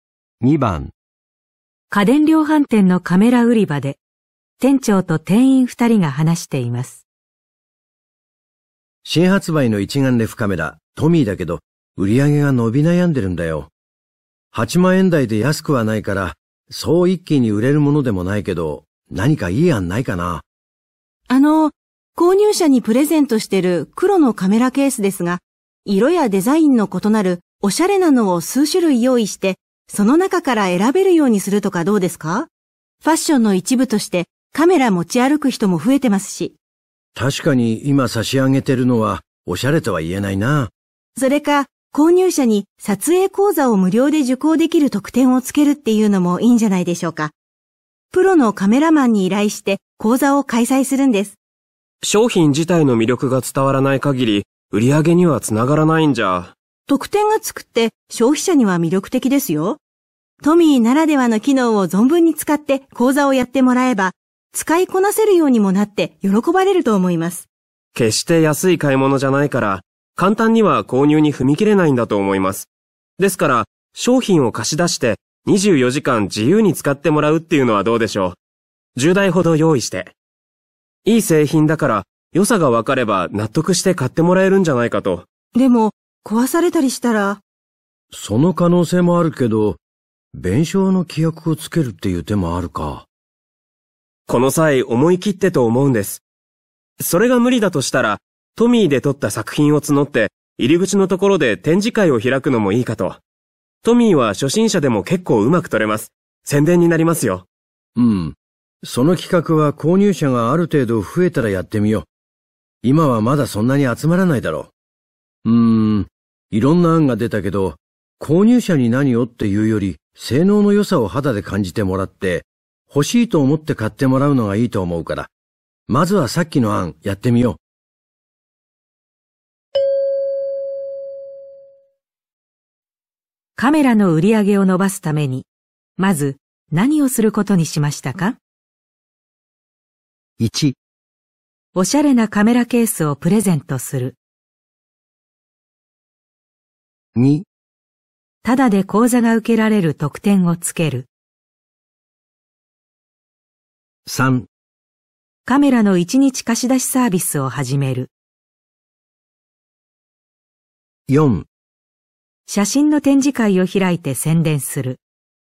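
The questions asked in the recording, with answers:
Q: カメラの売り上げを伸ばすためにまず何をすることにしましたか?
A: 3: カメラの一日貸し出しサービスを始める。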